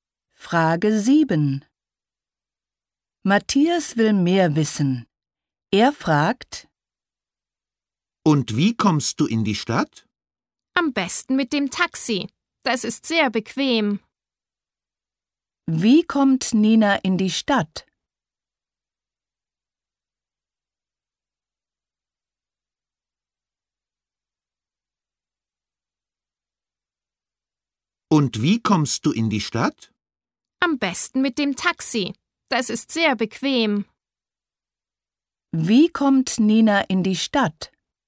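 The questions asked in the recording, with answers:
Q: Wie kommt Nina in die Stadt?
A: Mit dem Taxi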